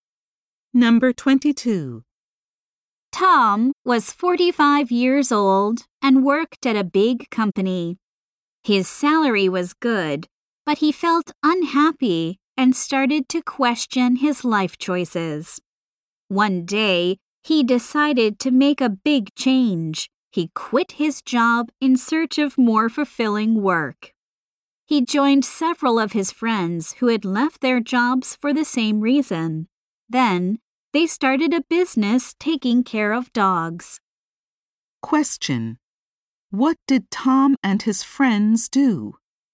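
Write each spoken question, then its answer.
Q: What did Tom and his friends do?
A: They started a dog-care business.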